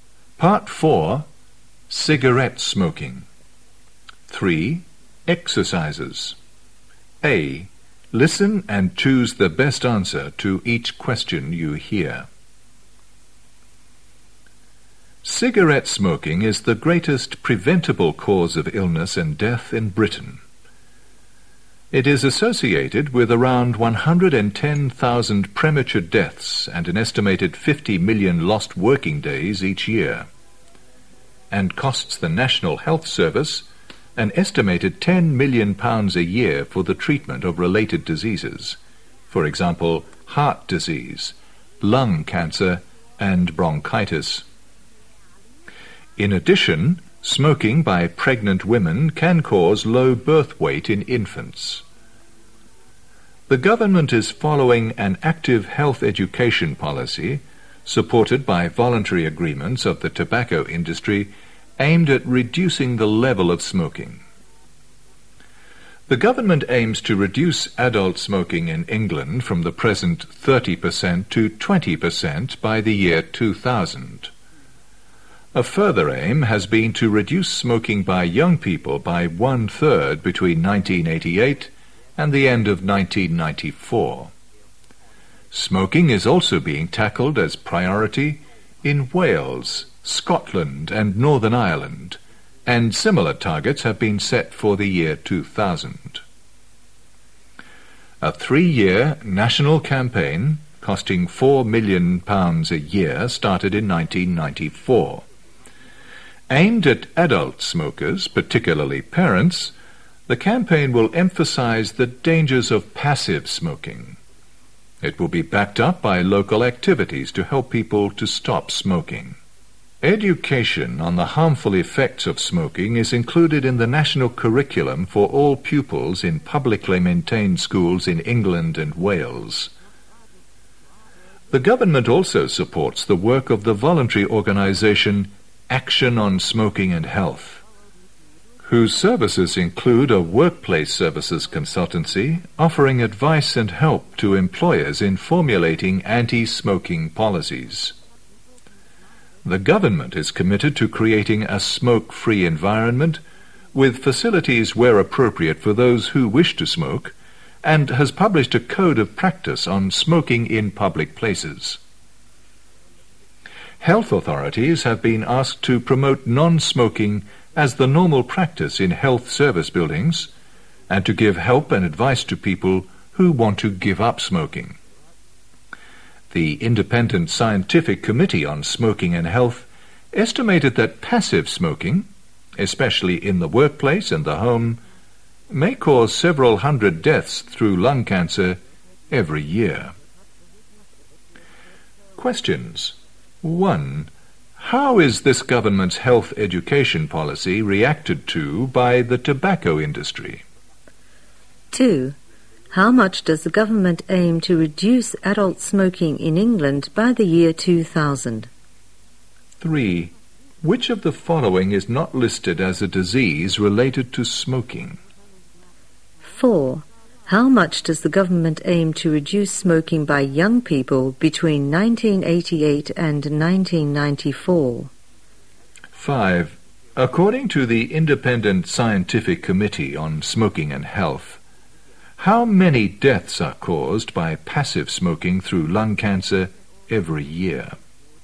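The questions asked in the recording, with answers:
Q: How is this government's health education policy reacted to by the tobacco industry?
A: It is supported by voluntary agreements of the tobacco industry

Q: How much does the government aim to reduce adult smoking in England by the year 2000?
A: From the present 30% to 20%

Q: How much does the government aim to reduce smoking by young people between 1988 and 1994?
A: By one-third

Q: According to the Independent Scientific Committee on Smoking and Health,How many deaths are caused by passive smoking through lung cancer every year?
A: Several hundred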